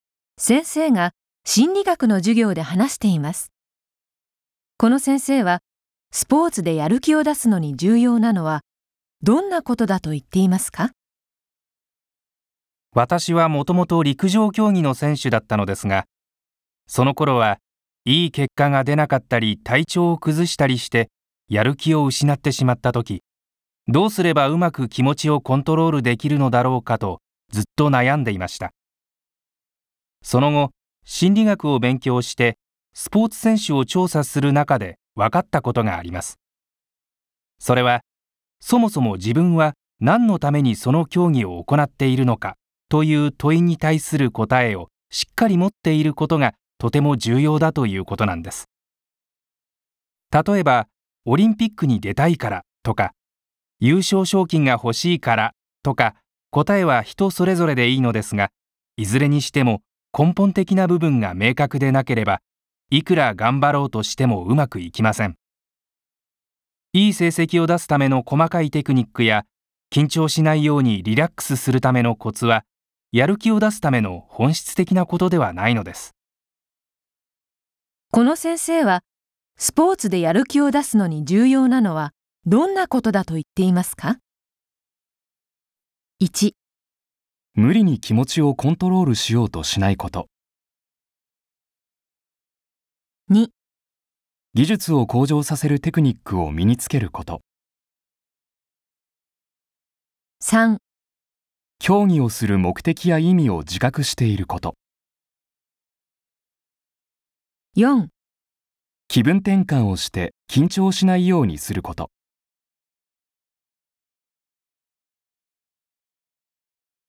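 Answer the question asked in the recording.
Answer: 3: 競技をする目的や意味を自覚していること。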